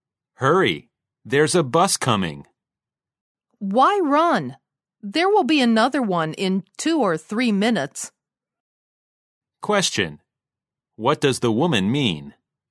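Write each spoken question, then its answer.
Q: What does the woman mean?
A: There's no need to hurry; another bus will come in 2 or 3 minutes.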